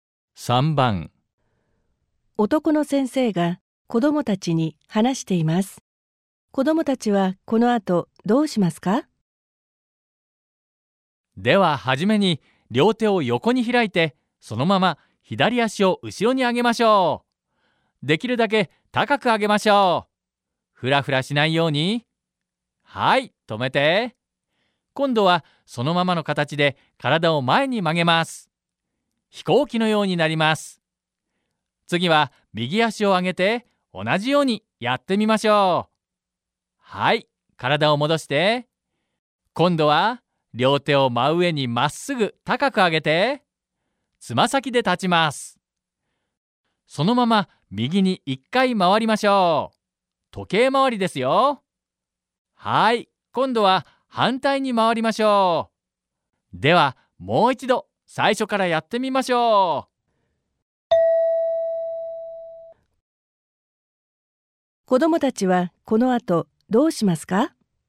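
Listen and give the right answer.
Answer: もう一度最初から:両手を横に開いて、左足を後ろに上げる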